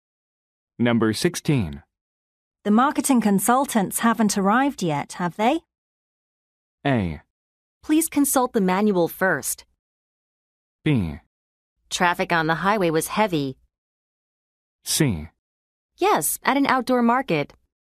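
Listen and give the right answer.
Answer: B: Traffic on the highway was heavy.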